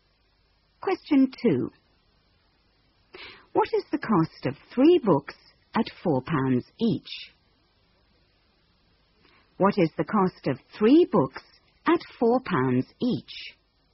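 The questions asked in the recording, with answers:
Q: What is the cost of 3 books at £4 each?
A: £12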